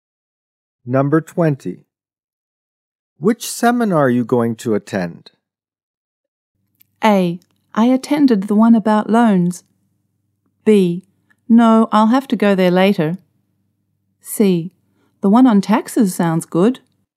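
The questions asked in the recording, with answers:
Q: Which seminar are you going to attend?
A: C: The one on taxes sounds good.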